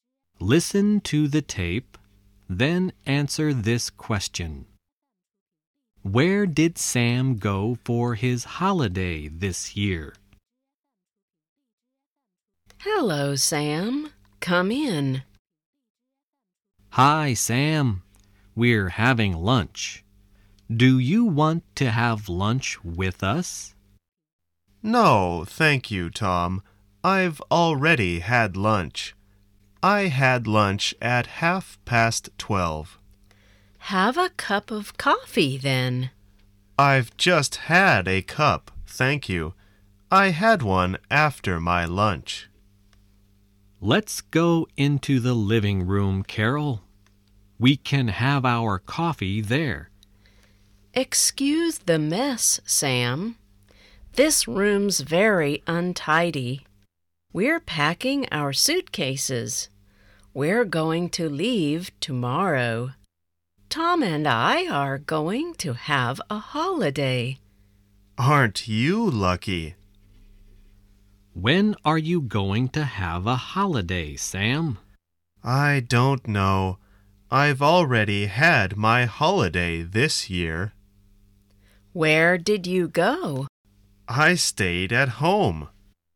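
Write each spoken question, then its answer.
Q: Where did Sam go for his holiday this year?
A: He stayed at home.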